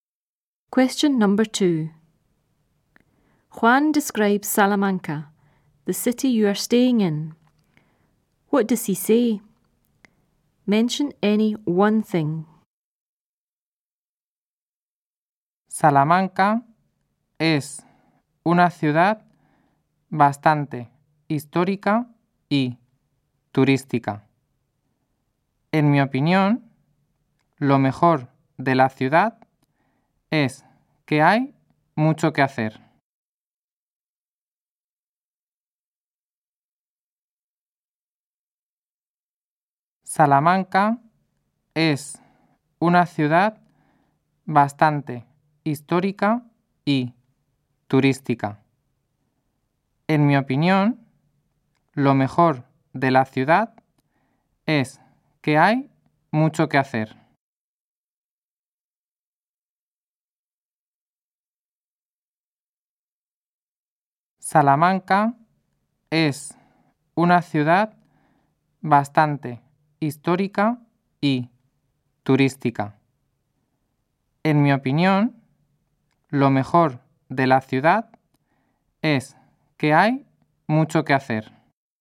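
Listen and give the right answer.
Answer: Quite historic and touristy; lots to do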